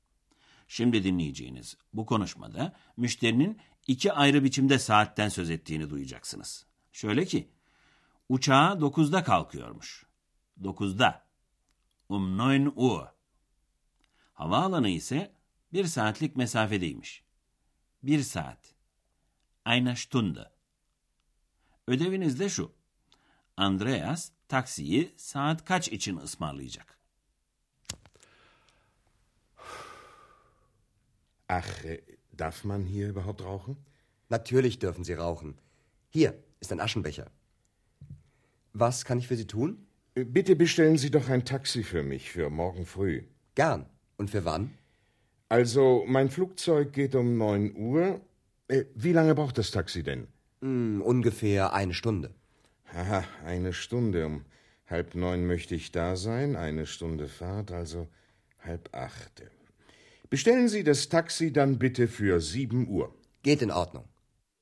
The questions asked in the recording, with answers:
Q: Andreas taksiyi saat kaç için ısmarlayacak?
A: Andreas taksiyi ertesi sabah saat 7 için ısmarlayacak.